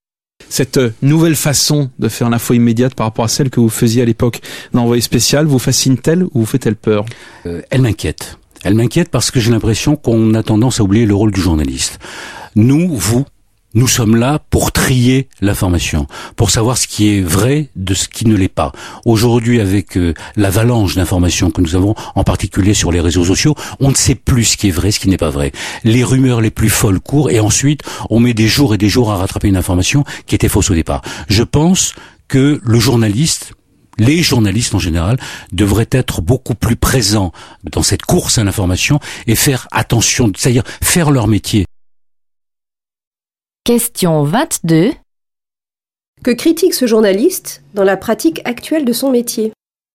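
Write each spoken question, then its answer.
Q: Que critique ce journaliste dans la pratique actuelle de son métier ?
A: On oublie le rôle du journaliste : trier l'information et vérifier ce qui est vrai, face aux rumeurs des réseaux sociaux.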